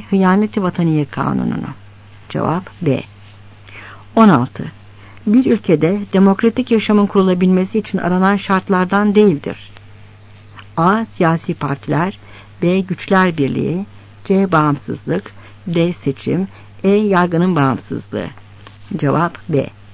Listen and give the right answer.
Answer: Cevap B.